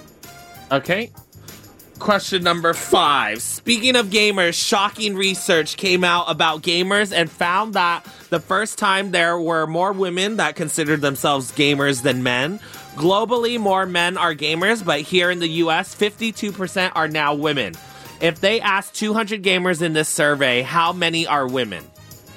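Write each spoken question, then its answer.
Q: If they asked 200 gamers in this survey, how many are women?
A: 104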